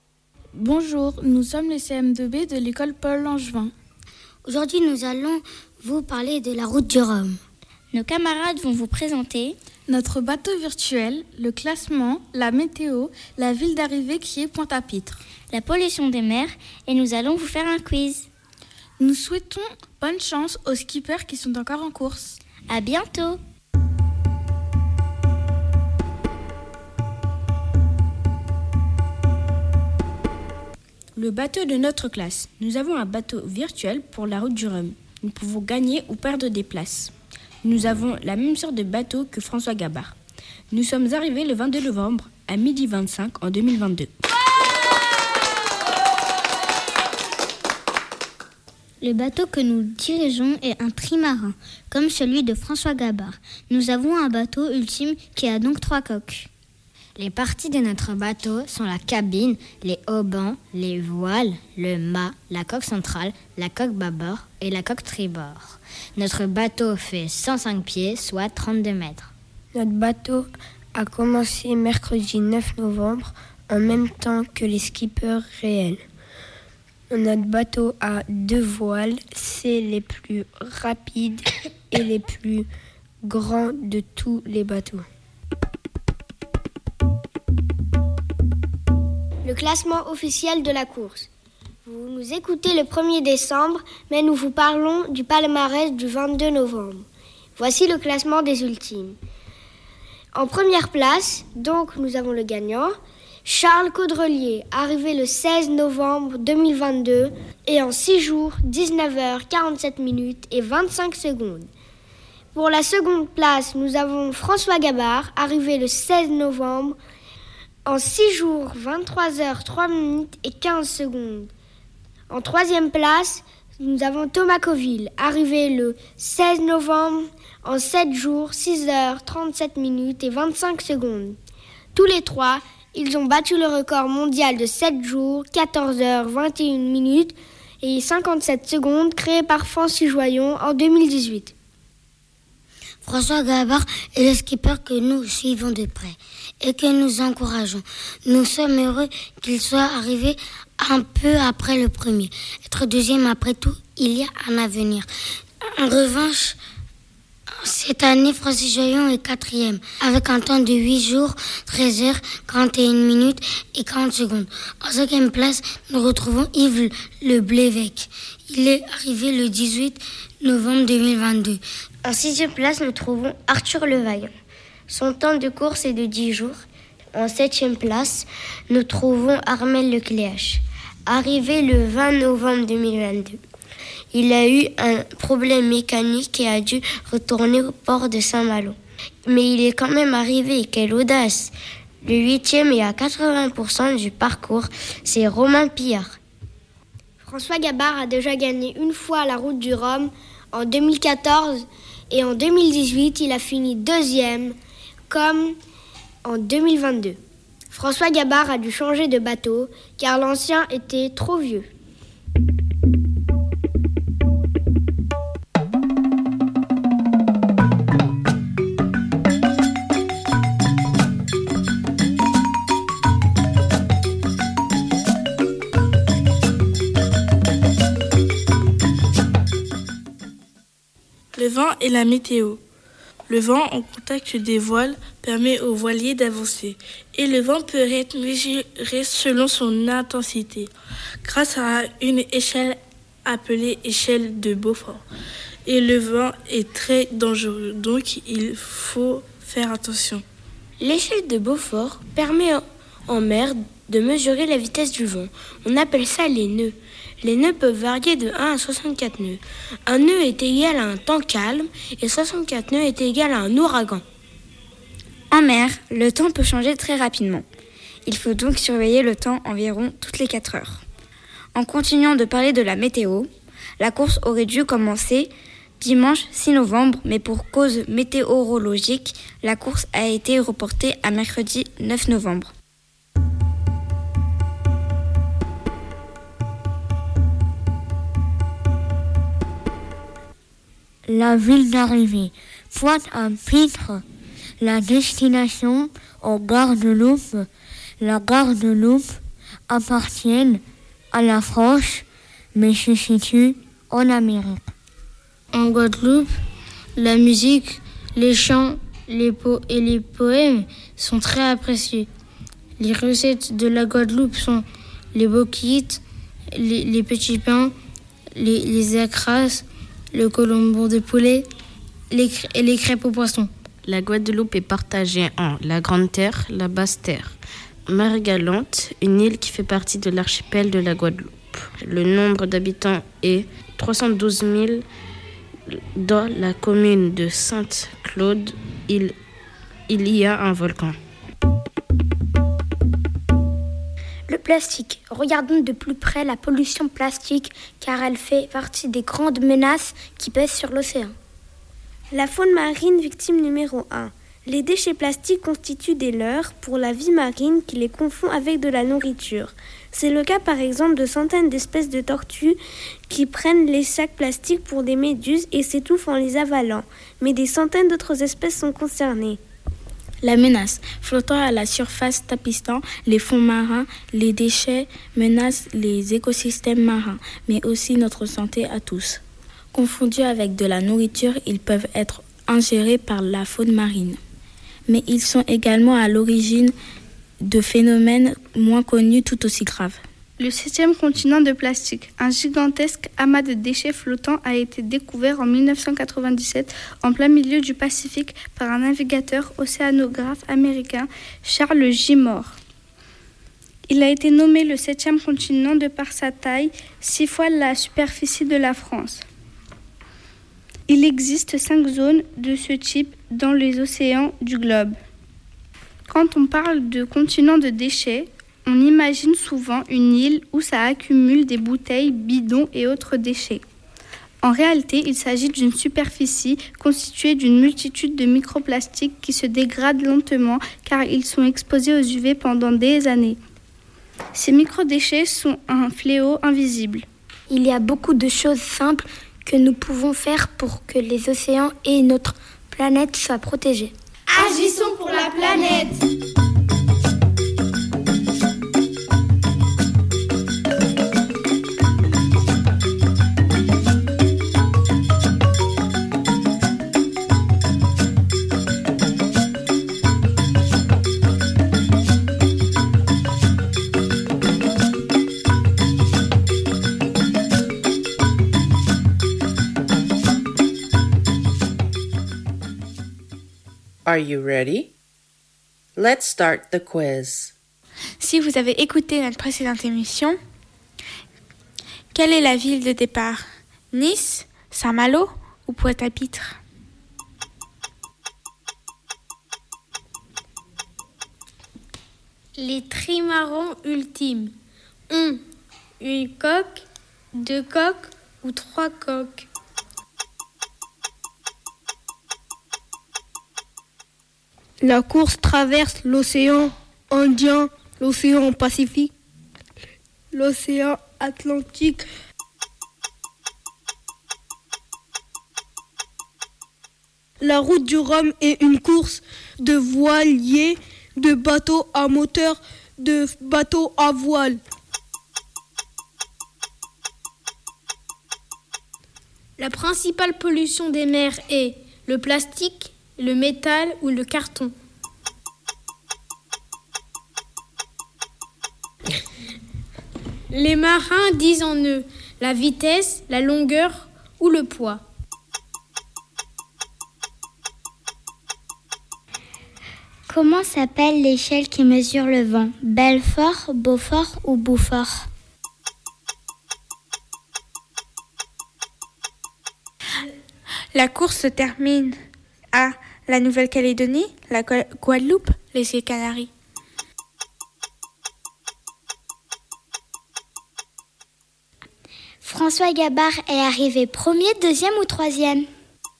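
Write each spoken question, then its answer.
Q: Les trimarans ultimes ont une coque, deux coques ou trois coques?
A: trois coques

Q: La principale pollution des mers est le plastique, le métal ou le carton.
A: le plastique

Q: Les marins disent en eux la vitesse, la longueur ou le poids.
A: la vitesse

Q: Comment s'appelle l'échelle qui mesure le vent?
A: Beaufort

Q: La course se termine à la Nouvelle-Calédonie, la Guadeloupe, les îles Canaries.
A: la Guadeloupe

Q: François Gabart est arrivé premier, deuxième ou troisième?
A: deuxième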